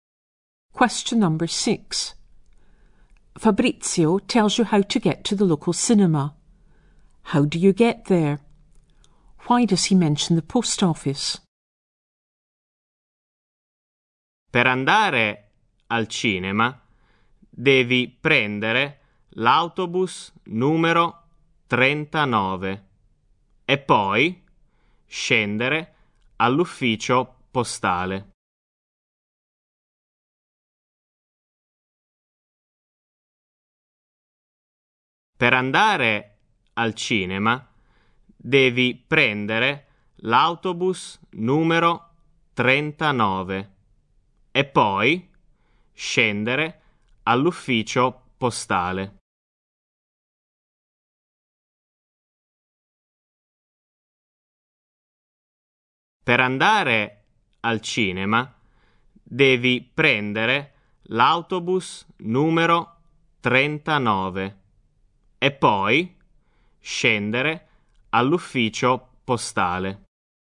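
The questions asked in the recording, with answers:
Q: How do you get there?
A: Take bus number 39

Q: Why does he mention the post office?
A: You get off the bus there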